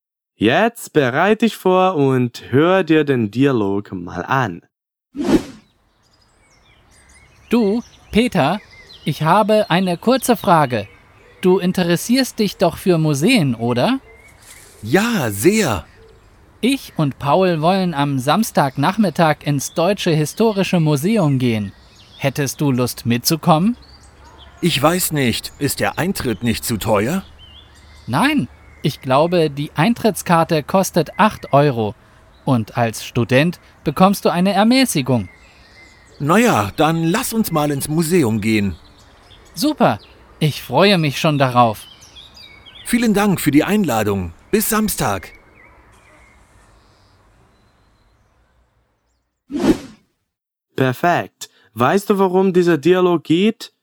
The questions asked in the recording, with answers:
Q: Weißt du, worum dieser Dialog geht?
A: der Dialog geht um eine Vereinbarung eines Ausflugs.